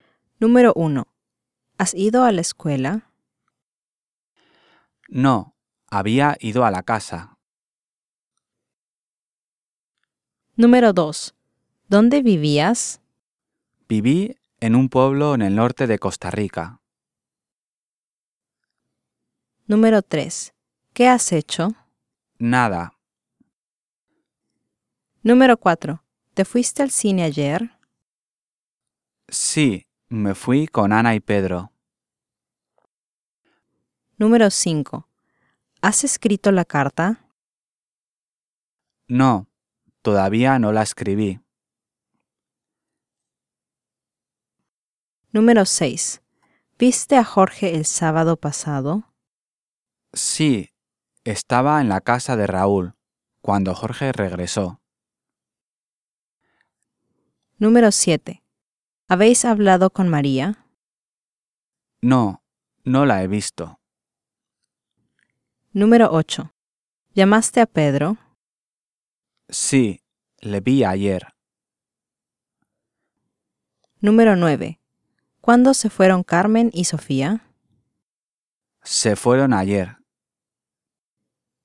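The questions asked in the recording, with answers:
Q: ¿Qué has hecho? Nada.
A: lógica

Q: ¿Te fuiste al cine ayer? Sí, me fui con Ana y Pedro.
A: lógica

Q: ¿Llamaste a Pedro? Sí, le vi ayer.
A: ilógica

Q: ¿Cuándo se fueron Carmen y Sofía? Se fueron ayer.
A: lógica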